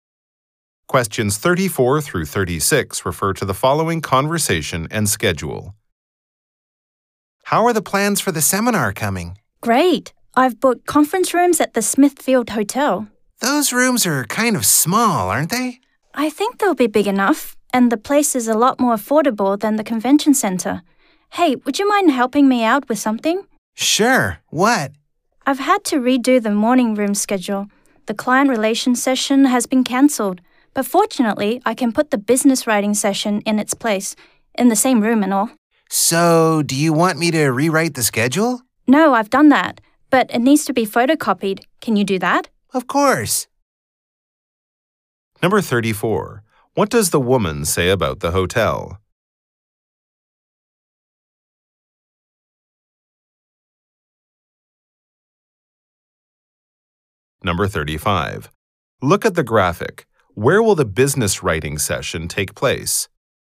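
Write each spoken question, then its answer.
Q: What does the woman say about the hotel?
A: It's more affordable than the convention center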